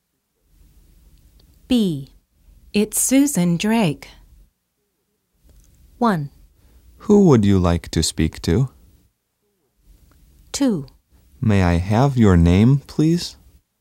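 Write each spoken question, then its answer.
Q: It's Susan Drake.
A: 2: May I have your name, please?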